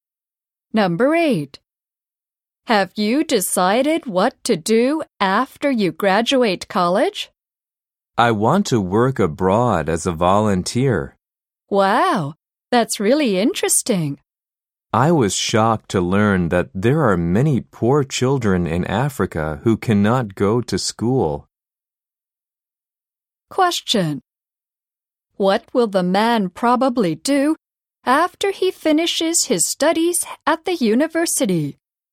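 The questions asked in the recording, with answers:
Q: What will the man probably do after he finishes his studies at the university?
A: Work abroad as a volunteer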